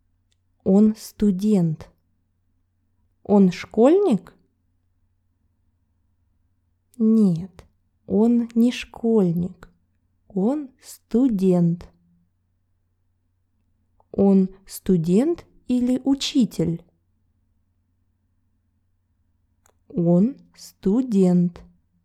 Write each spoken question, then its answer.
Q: Он студент или учитель?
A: Он студент.